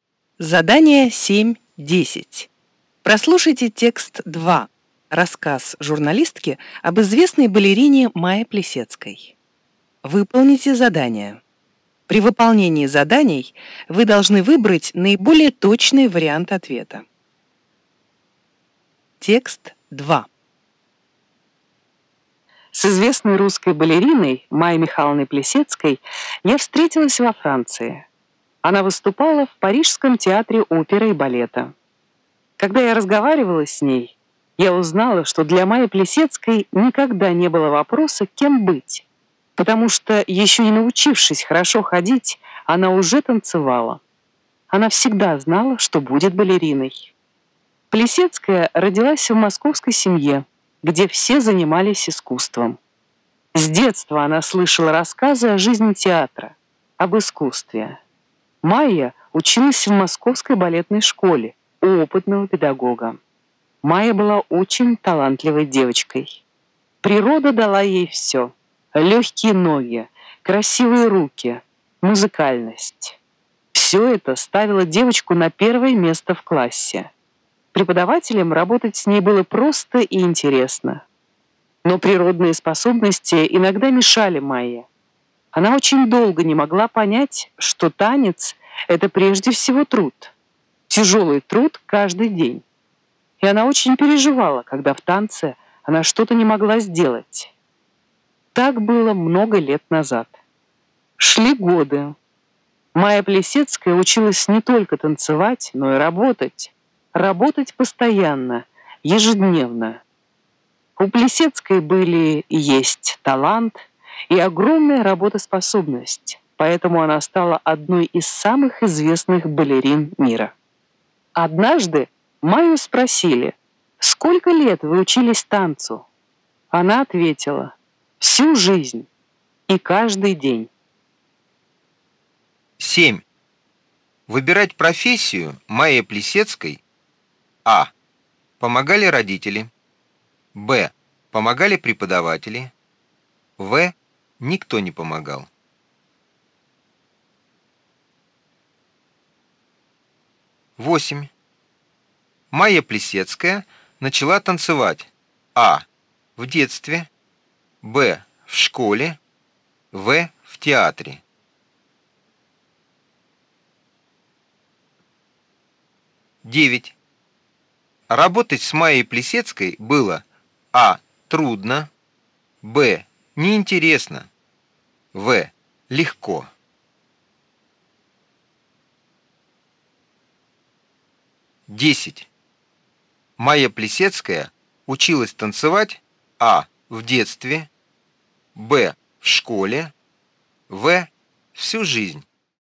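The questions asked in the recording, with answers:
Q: Майя Плисецкая начала танцевать. А. В детстве. Б. В школе. В. В театре.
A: А: В детстве

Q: Работать с Майей Плисецкой было А. трудно, Б. неинтересно, В. легко.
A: В: легко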